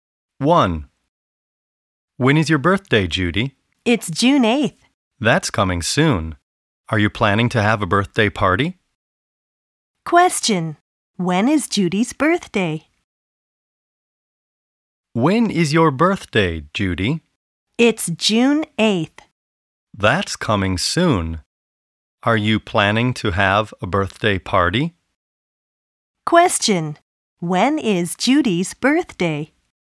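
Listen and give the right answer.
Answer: June 8th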